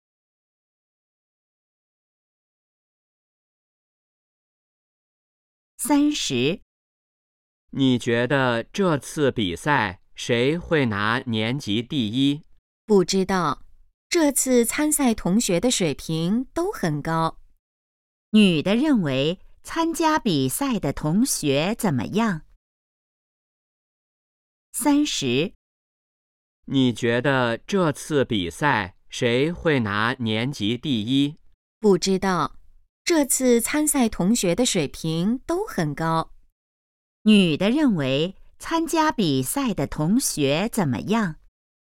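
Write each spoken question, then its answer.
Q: 女的认为参加比赛的同学怎么样?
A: 水平都很高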